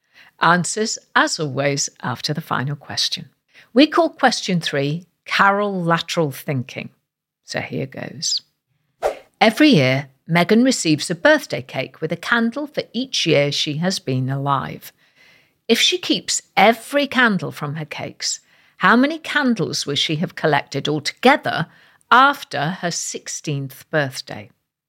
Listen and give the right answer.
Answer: And the answer is 136 candles.